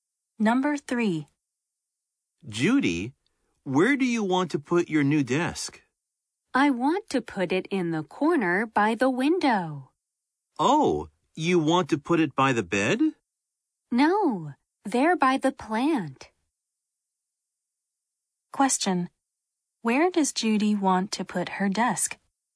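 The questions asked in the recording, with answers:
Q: Where does Judy want to put her desk?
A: In the corner by the window, by the plant.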